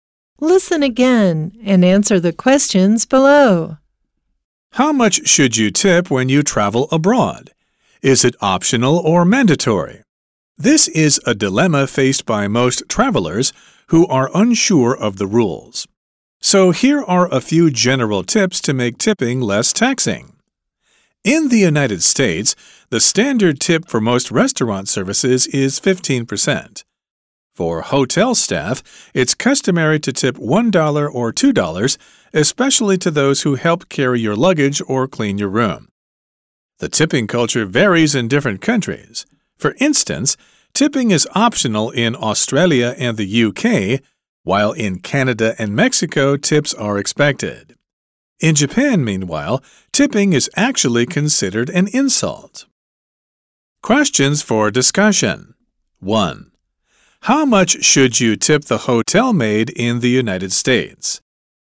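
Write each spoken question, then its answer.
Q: How much should you tip the hotel maid in the United States?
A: $1 or $2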